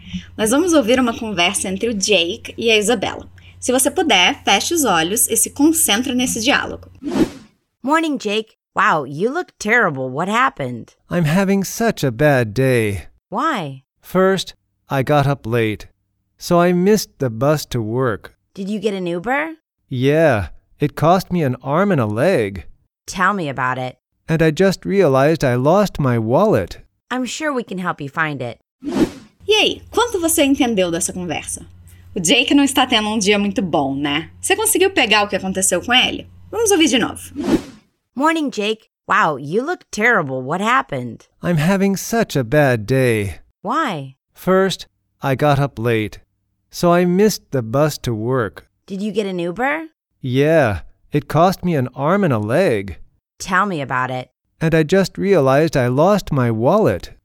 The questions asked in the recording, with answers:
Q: Você conseguiu pegar o que aconteceu com ele?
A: Ele acordou tarde, perdeu o ônibus, teve que pegar um Uber e ainda perdeu a carteira.